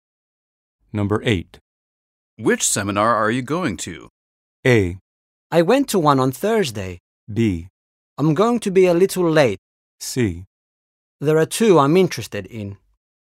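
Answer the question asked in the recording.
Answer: C: There are 2 I'm interested in.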